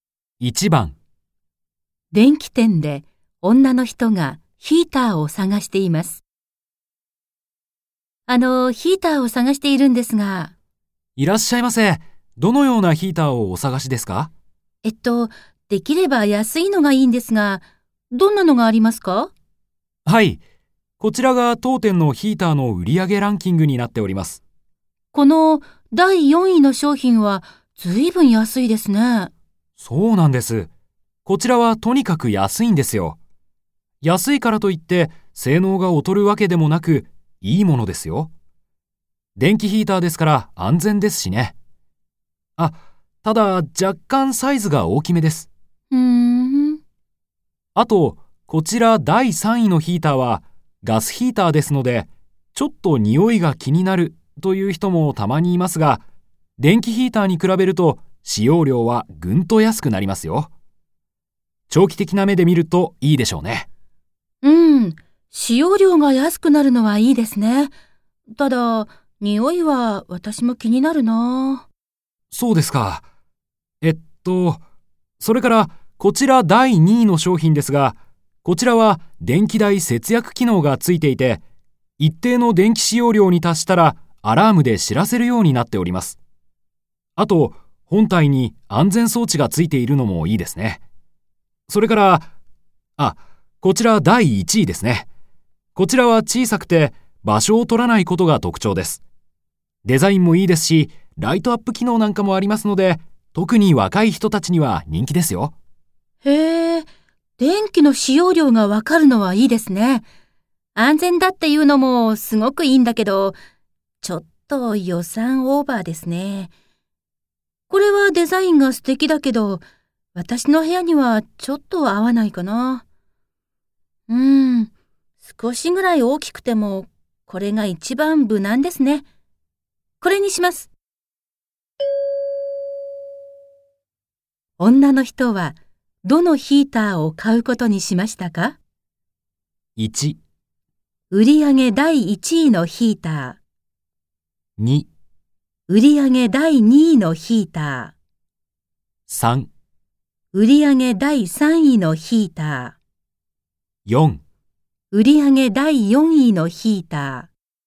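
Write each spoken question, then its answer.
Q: 女の人は、どのヒーターを買うことにしましたか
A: 4: 売上第4位のヒーター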